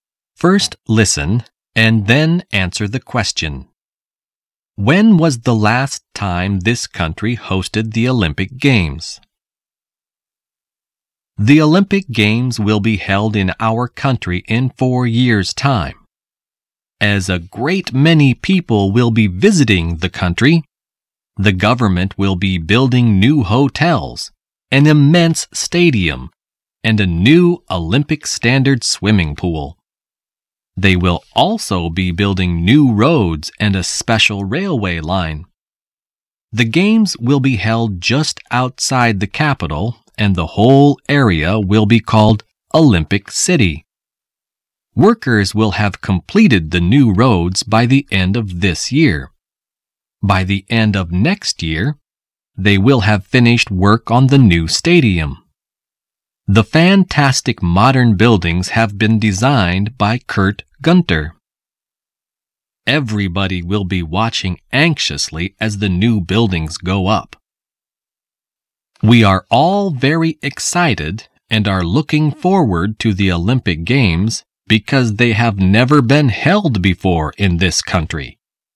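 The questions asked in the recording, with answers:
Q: When was the last time this country hosted the Olympic Games?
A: Never; the Olympic Games have never been held in this country before.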